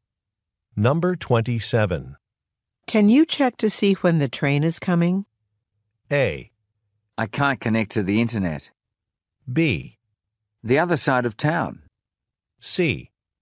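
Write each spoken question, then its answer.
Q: Can you check to see when the train is coming?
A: A: I can't connect to the internet.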